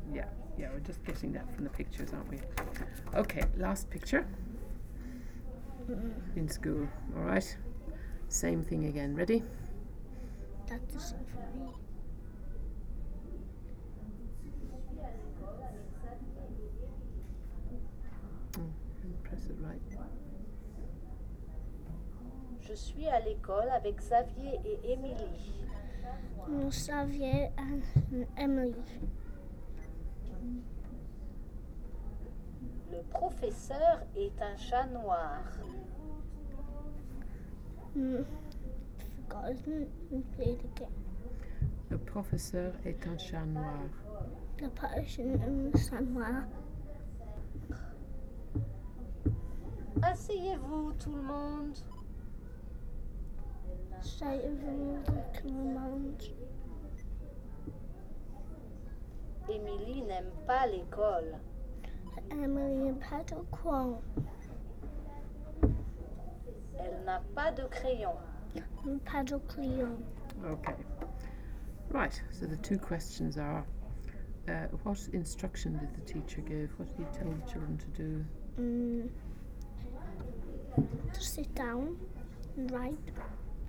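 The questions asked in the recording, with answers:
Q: what instruction did the teacher give?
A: Sit down, everyone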